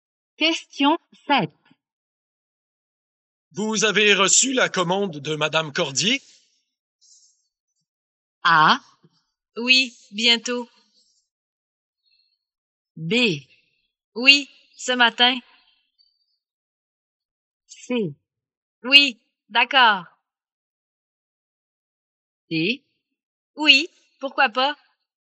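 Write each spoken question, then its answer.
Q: Vous avez reçu la commande de Madame Cordier?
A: B: Oui, ce matin.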